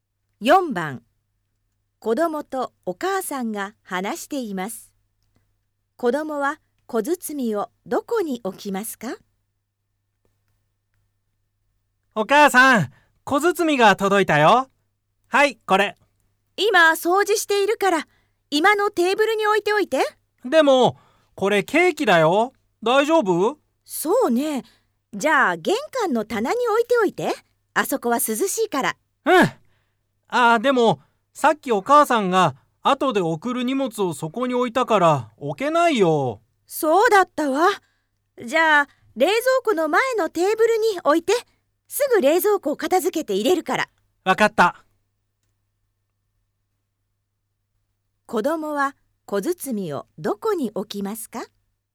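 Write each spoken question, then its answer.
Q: 子供は小包をどこに置きますか?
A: 冷蔵庫の前のテーブル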